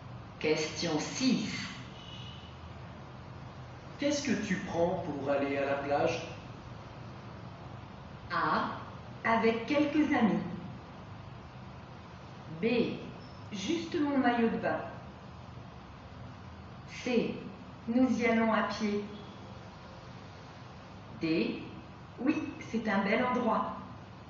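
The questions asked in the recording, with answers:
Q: Qu'est-ce que tu prends pour aller à la plage?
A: B: Juste mon maillot de bain.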